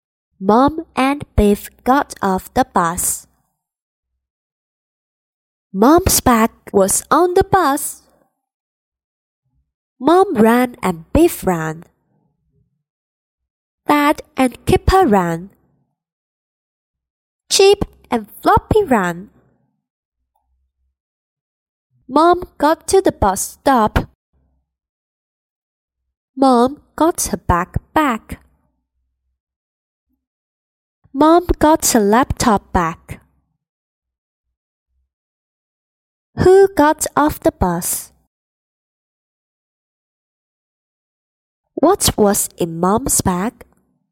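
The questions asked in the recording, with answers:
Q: Who got off the bus?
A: Mom and Biff

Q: What was in Mom's bag?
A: A laptop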